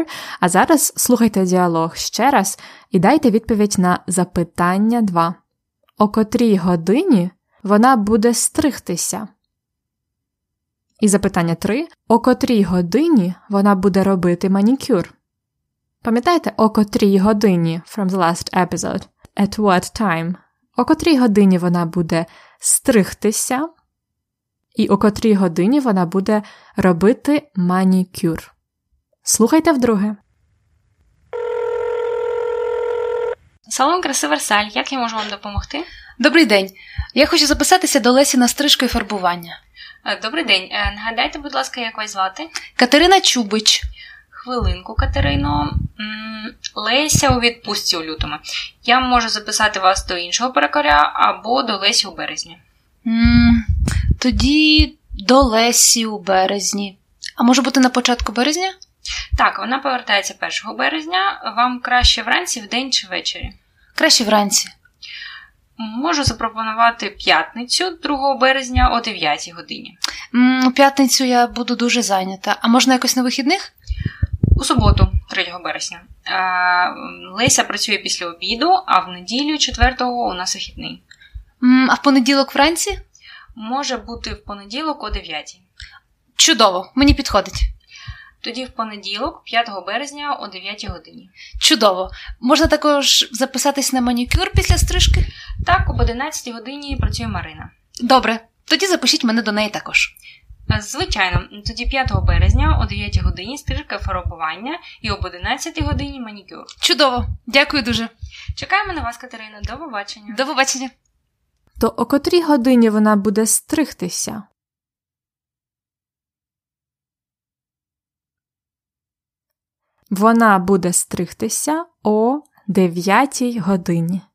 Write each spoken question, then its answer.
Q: О котрій годині вона буде робити манікюр?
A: Вона буде робити манікюр об 11 годині.